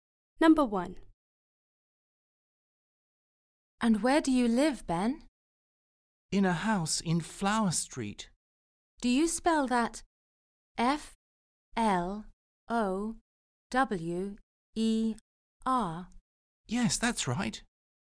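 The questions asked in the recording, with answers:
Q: And where do you live, Ben?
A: Flower Street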